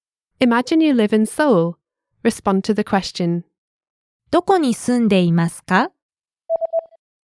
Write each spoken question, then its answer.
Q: どこに住んでいますか?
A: ソウルに住んでいます。